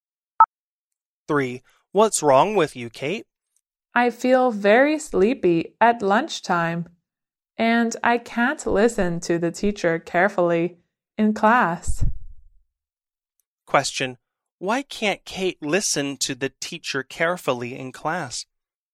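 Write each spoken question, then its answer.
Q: Why can't Kate listen to the teacher carefully in class?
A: She feels very sleepy at lunchtime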